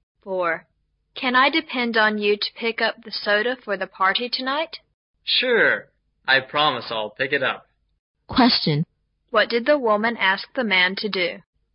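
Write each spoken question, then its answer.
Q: What did the woman ask the man to do?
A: Pick up the soda for the party tonight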